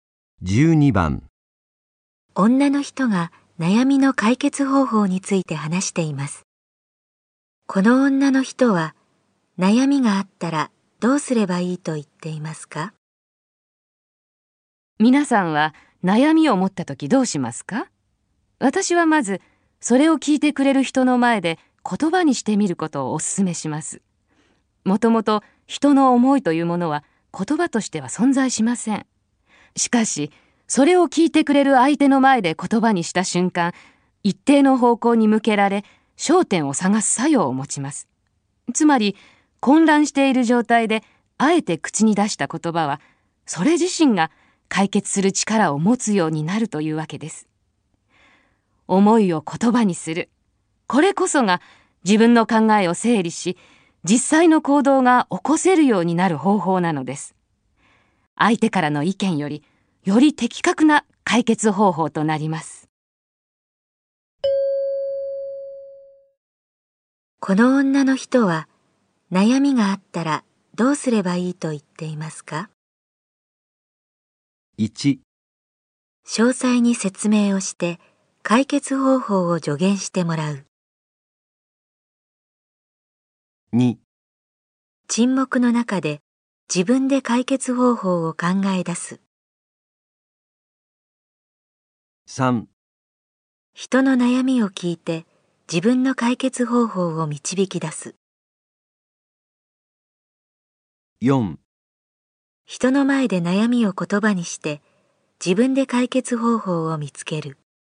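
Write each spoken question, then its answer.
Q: この女の人は悩みがあったらどうすればいいと言っていますか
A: 4: 人の前で悩みを言葉にして自分で解決方法を見つける。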